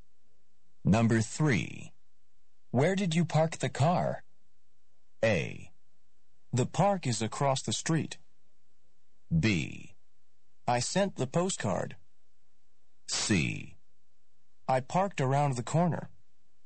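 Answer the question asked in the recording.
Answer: C: I parked around the corner.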